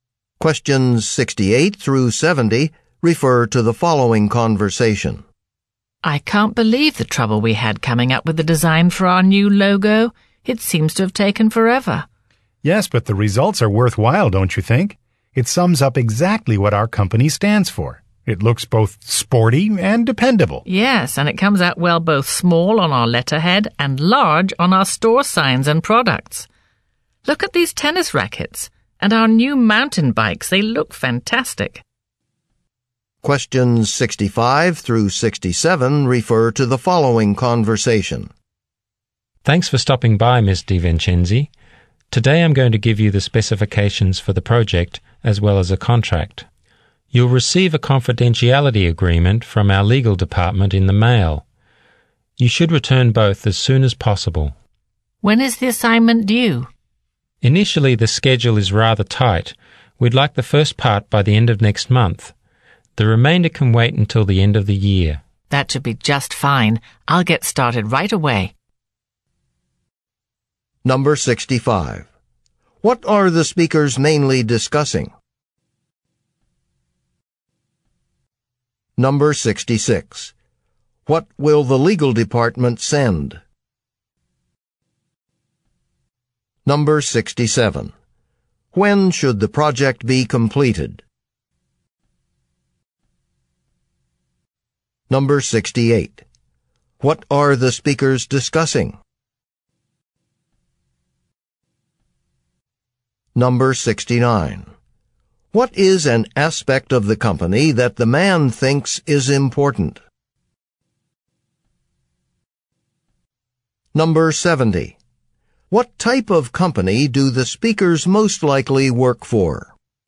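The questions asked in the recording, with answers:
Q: What are the speakers mainly discussing?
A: A project assignment (specifications and contract)

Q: What will the legal department send?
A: A confidentiality agreement

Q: When should the project be completed?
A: By the end of the year

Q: What are the speakers discussing?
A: The design of their new company logo

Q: What type of company do the speakers most likely work for?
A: A sporting goods company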